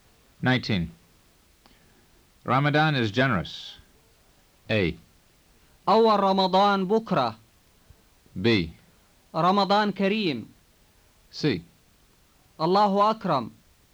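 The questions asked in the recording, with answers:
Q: Ramadan is generous.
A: B: رمضان كريم.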